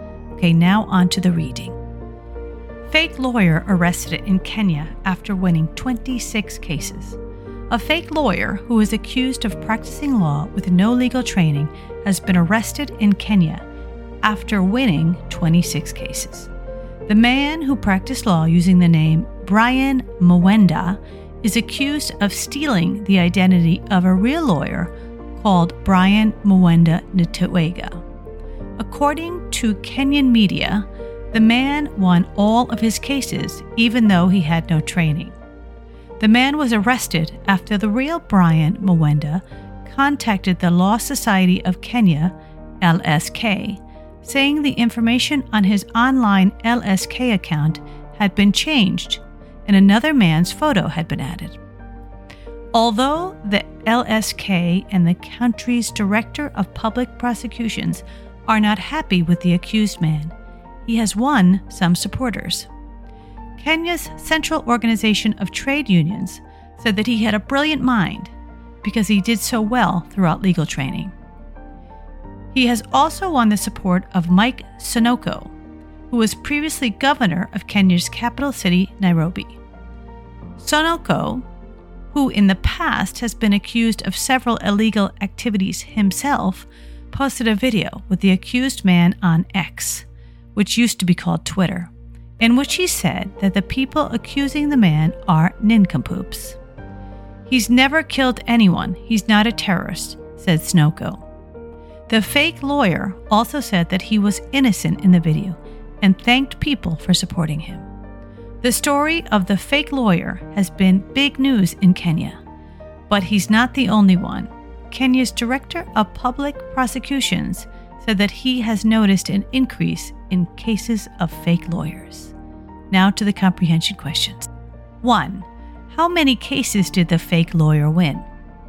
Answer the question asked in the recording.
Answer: 26 cases.